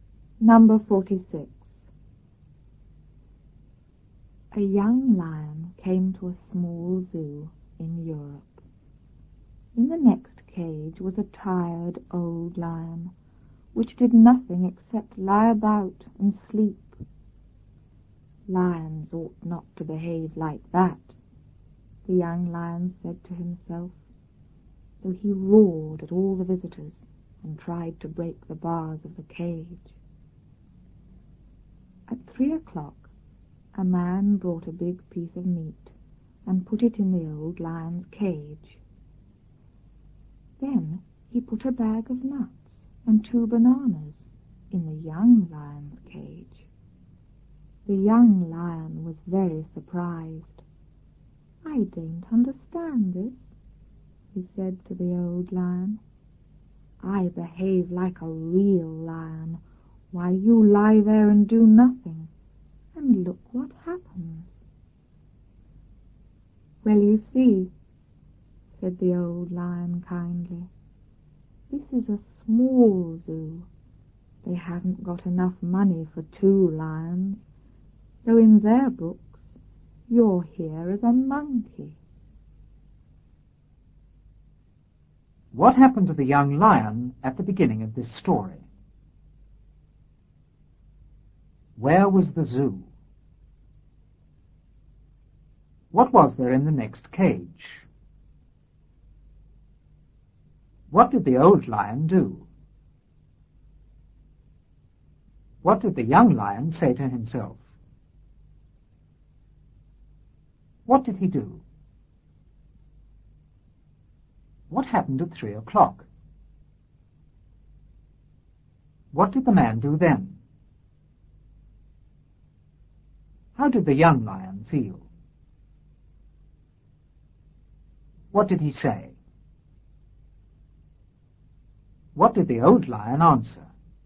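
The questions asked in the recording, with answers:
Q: What happened to the young lion at the beginning of this story?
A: He came to a small zoo in Europe.

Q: Where was the zoo?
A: In Europe.

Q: What was there in the next cage?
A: A tired old lion.

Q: What did the old lion do?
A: Nothing except lie about and sleep.

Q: What did the young lion say to himself?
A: Lions ought not to behave like that.

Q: What did he do?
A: He roared at the visitors and tried to break the bars of the cage.

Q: What happened at 3 o'clock?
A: A man brought a big piece of meat and put it in the old lion's cage.

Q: What did the man do then?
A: He put a bag of nuts and 2 bananas in the young lion's cage.

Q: How did the young lion feel?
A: Very surprised.

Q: What did he say?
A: I don't understand this. I behave like a real lion, you do nothing, and look what happens.

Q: What did the old lion answer?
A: It's a small zoo without money for 2 lions, so in their books the young lion is a monkey.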